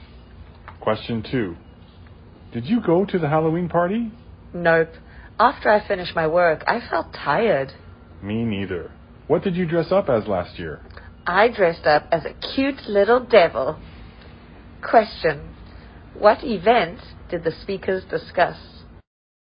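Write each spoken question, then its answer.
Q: What event did the speakers discuss?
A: The Halloween party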